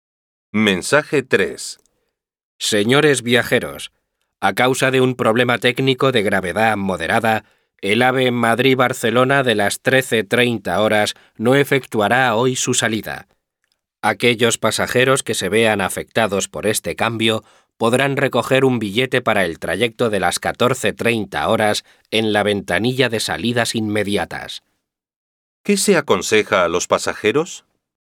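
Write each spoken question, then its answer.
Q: ¿Qué se aconseja a los pasajeros?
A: Recoger un billete para el tren de las 14:30 en la ventanilla de salidas inmediatas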